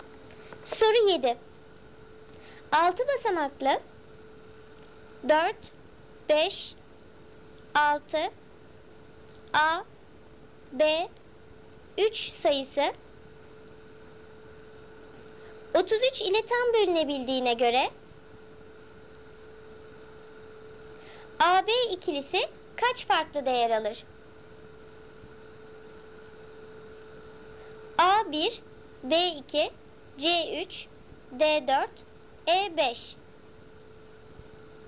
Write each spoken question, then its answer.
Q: AB ikilisi kaç farklı değer alır?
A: Doğru cevap C3.